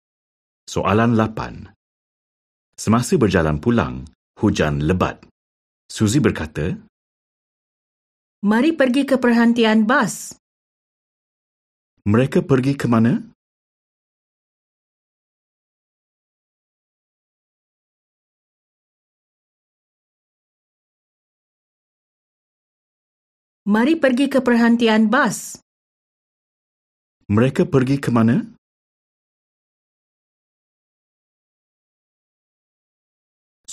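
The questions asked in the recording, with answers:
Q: Mereka pergi ke mana?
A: Perhentian bas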